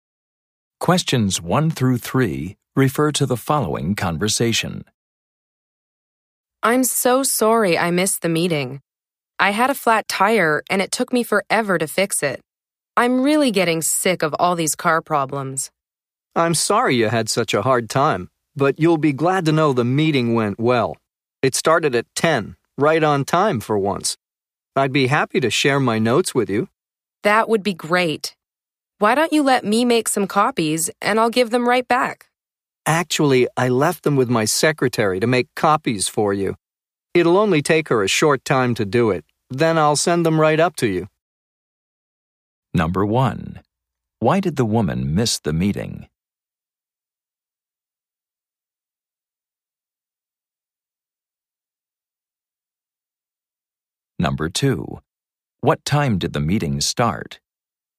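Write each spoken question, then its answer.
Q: Why did the woman miss the meeting?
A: She had a flat tire

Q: What time did the meeting start?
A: At 10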